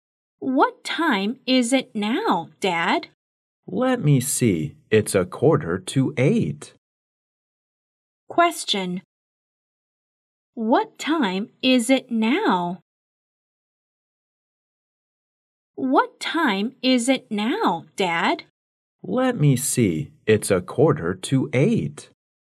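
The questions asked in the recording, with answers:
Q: What time is it now?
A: It's a quarter to eight.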